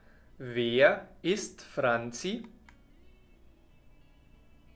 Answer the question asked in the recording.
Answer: Die Cousine von Tom. Sie ist die Cousine von Tom.